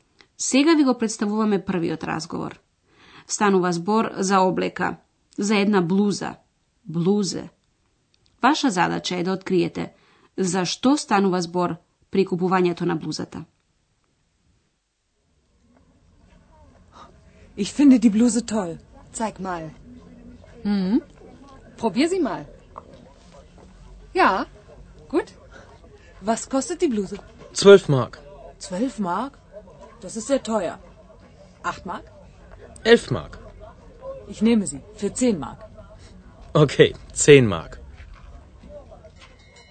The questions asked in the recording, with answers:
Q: Ваша задача е да откриете за што станува збор при купувањето на блузата.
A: Типична пазарска сцена. И двете страни се пазарат.